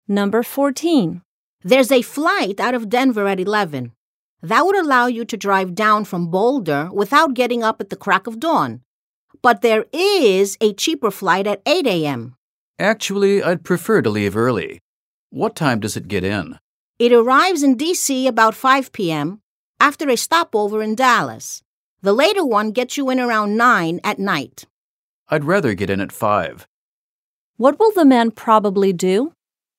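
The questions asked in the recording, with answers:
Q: What will the man probably do?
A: Take the cheaper 8 a.m. flight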